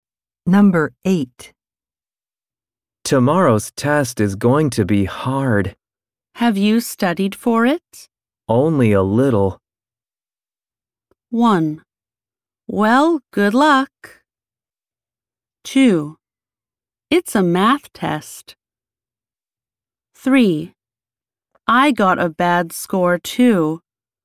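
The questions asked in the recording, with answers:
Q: Only a little.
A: 1: Well, good luck.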